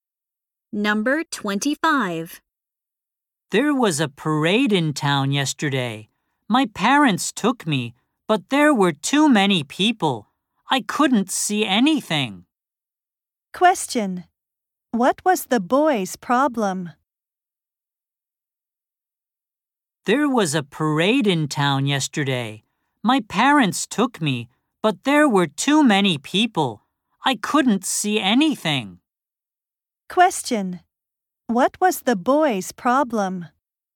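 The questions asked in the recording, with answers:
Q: What was the boy's problem?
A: He couldn't see anything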